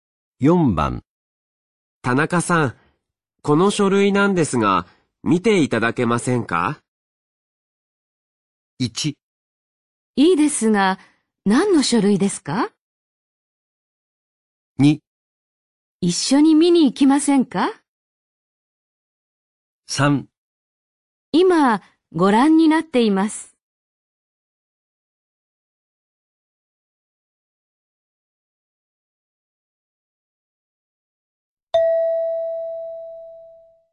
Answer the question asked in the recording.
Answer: 1

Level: N3 Listening · Test 9